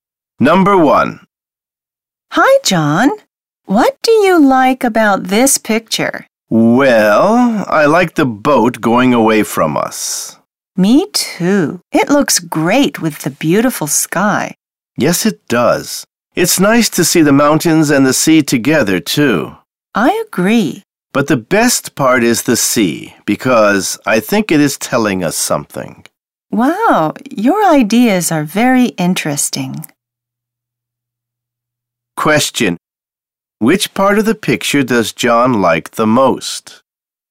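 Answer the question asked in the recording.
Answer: The sea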